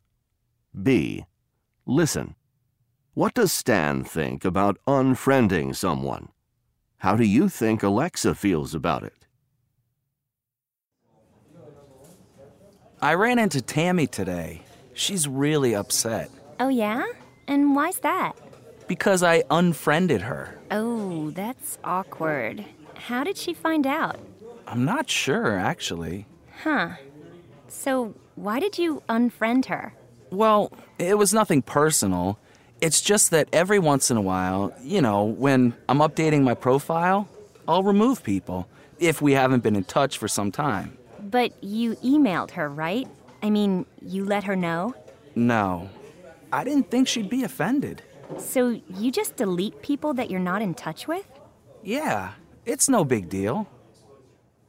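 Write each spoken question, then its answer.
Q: What does Stan think about unfriending someone?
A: He thinks it's no big deal.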